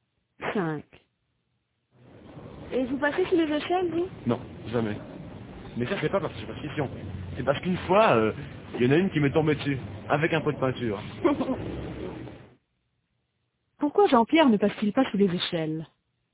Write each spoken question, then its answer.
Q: Pourquoi Jean-Pierre ne passe-t-il pas sous les échelles?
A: Parce qu'une fois, il y en a une qui lui est tombée dessus, avec un pot de peinture.